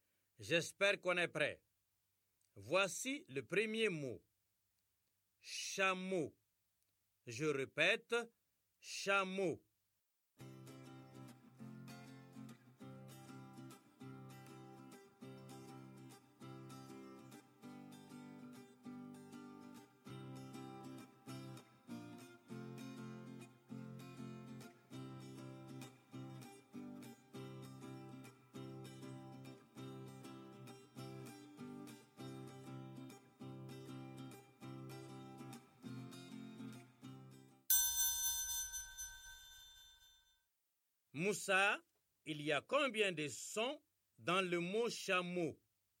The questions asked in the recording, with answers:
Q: Moussa, il y a combien de sons dans le mot chameau?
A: Ch, A, M, O, monsieur, 4 sons.